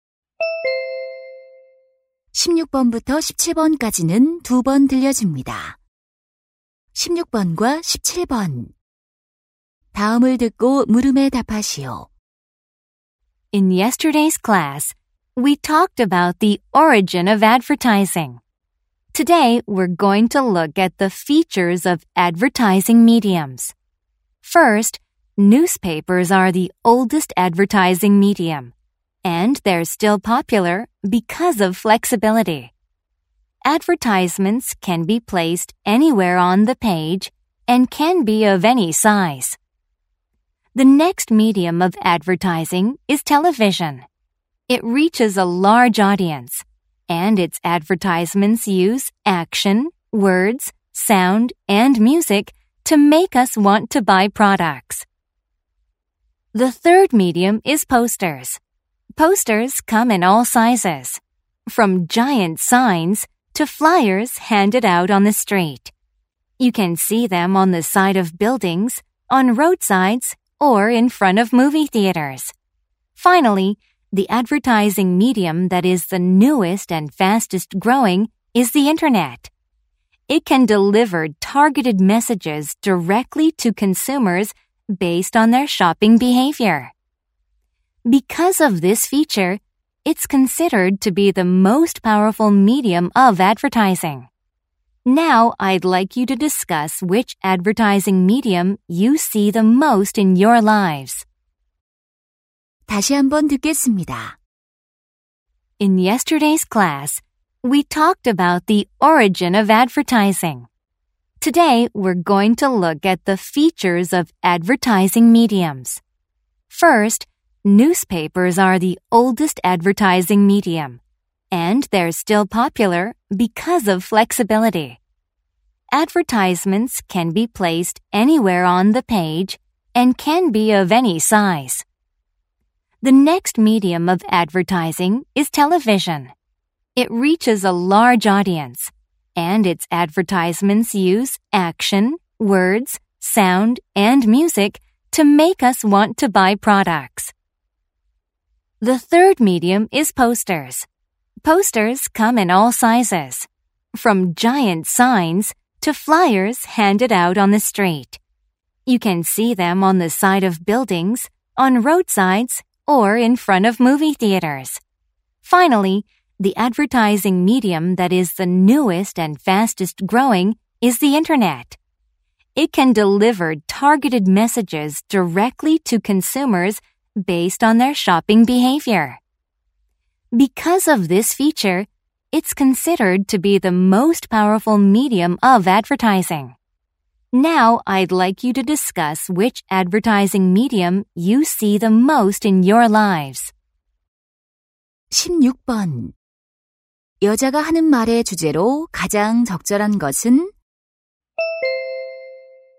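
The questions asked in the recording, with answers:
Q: 여자가 하는 말의 주제로 가장 적절한 것은?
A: 광고 매체의 특징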